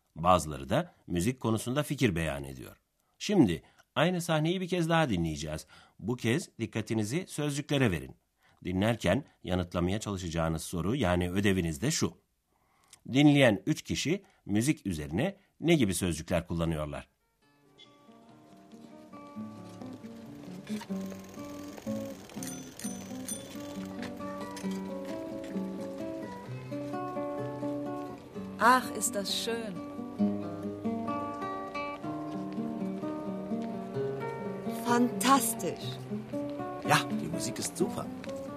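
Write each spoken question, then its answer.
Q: Dinleyen 3 kişi müzik üzerine ne gibi sözcükler kullanıyorlar?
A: Ach, ist das schön; Fantastisch; Ja, die Musik ist super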